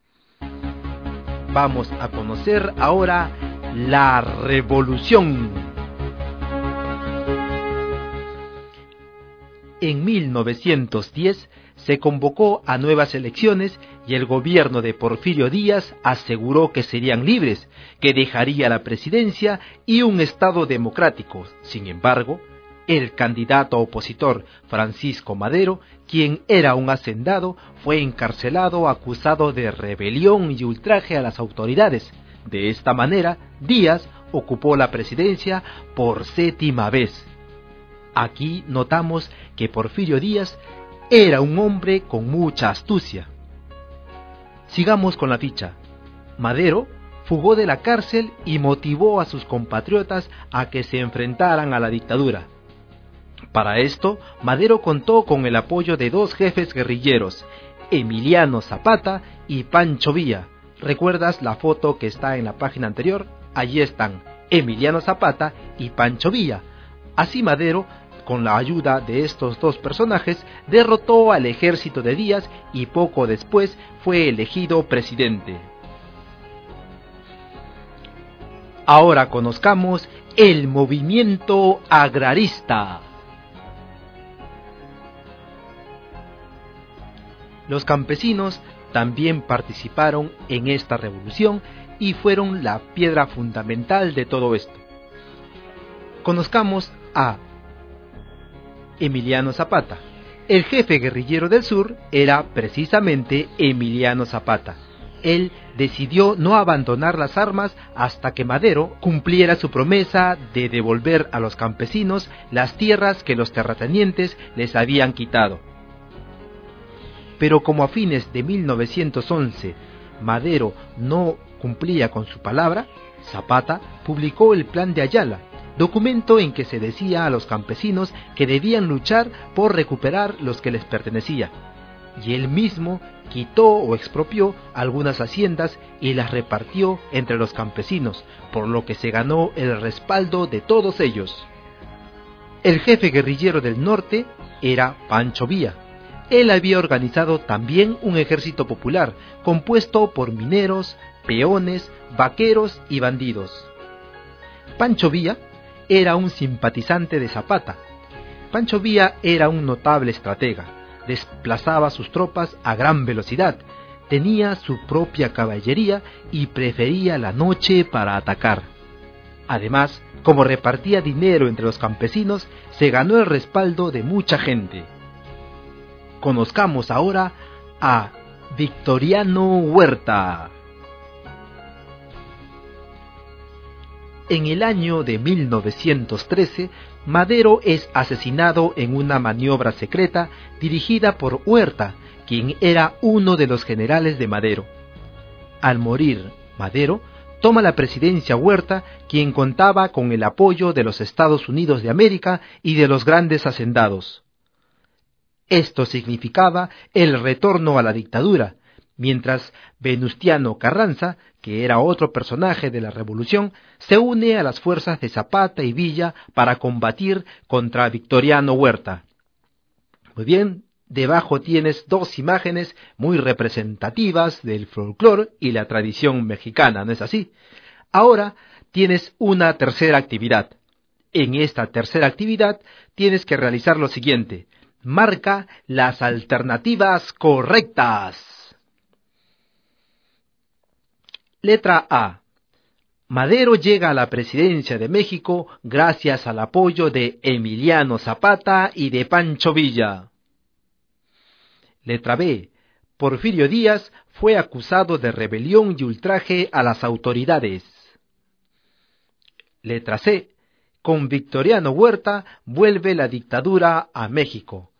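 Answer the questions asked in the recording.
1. Correcta
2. Incorrecta (fue Madero)
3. Correcta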